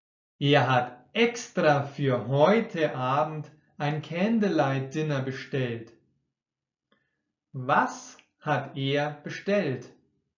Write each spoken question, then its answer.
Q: Was hat er bestellt.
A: Ein Candlelight Dinner. Er hat ein Candlelight Dinner bestellt.